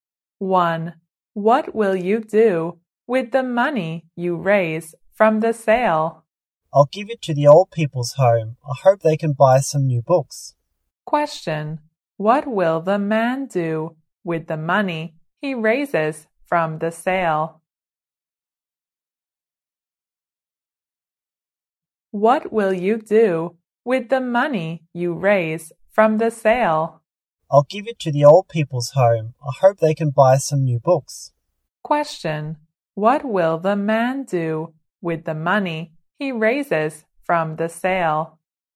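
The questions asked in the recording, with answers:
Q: What will the man do with the money he raises from the sale?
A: Give it to the old people's home.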